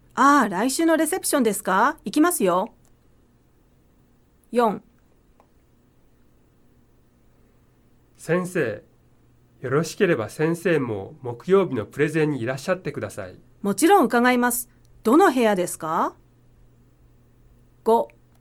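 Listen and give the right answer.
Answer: 出席する(○)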